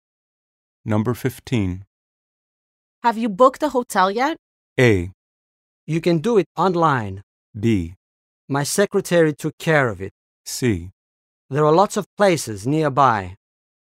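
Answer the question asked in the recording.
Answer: B: My secretary took care of it.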